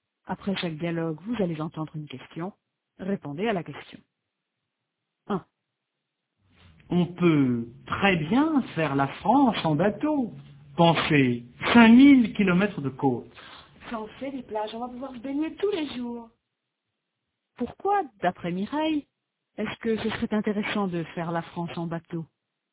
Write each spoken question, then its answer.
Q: Pourquoi, d'après Mireille, est-ce que ce serait intéressant de faire la France en bateau?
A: Parce qu'ils vont pouvoir se baigner tous les jours.